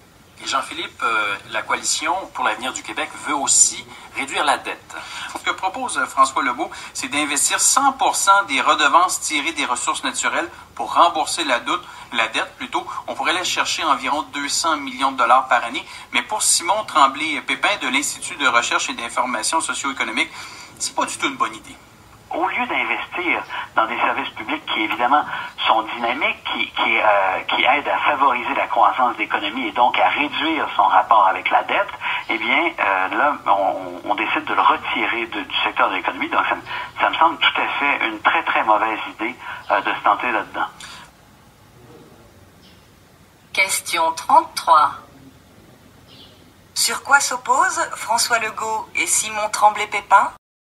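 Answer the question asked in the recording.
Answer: Sur l'utilisation de 100 % des redevances des ressources naturelles pour rembourser la dette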